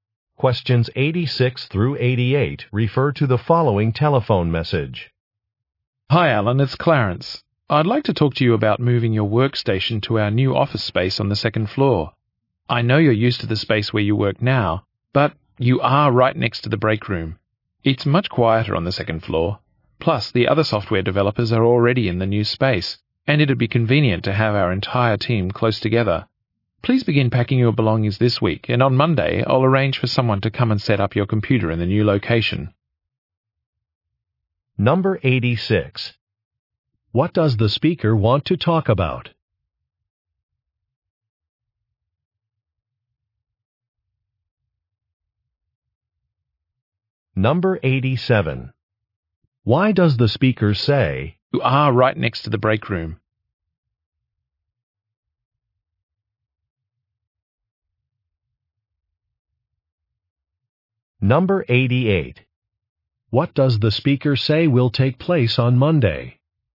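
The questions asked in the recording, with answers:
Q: What does the speaker want to talk about?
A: Moving Alan's workstation to the new office space

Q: Why does the speaker say,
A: His current space is noisy

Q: What does the speaker say will take place on Monday?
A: Someone will set up his computer in the new location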